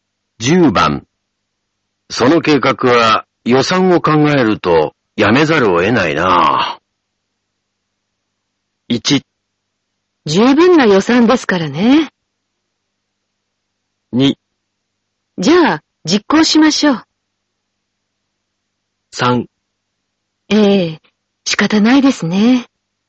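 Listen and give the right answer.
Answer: 3: ええ仕方ないですね。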